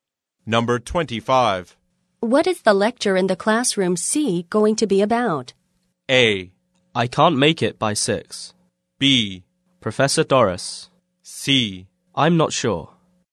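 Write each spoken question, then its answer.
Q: What is the lecture in the classroom C going to be about?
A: C: I'm not sure.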